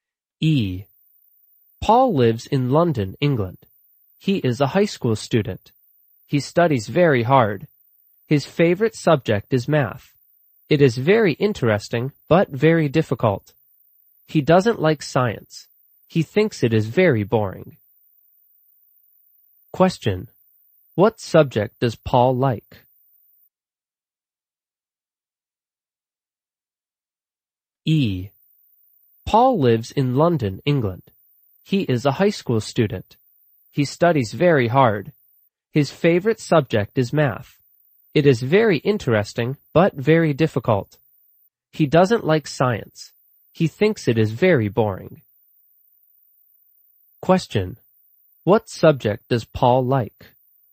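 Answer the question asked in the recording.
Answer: Math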